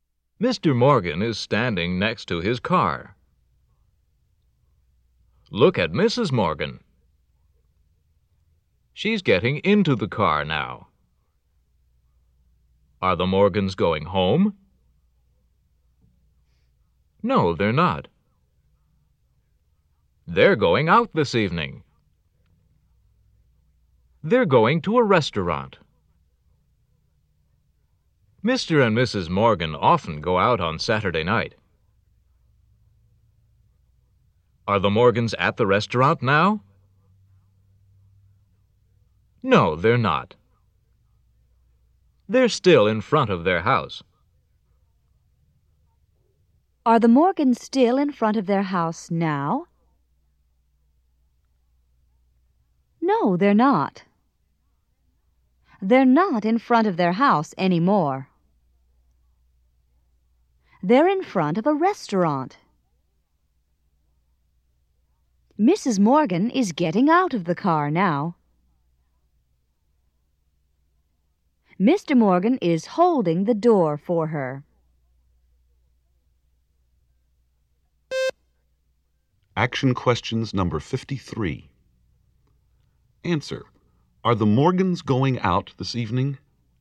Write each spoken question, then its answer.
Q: Are the Morgans going out this evening?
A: Yes, they are.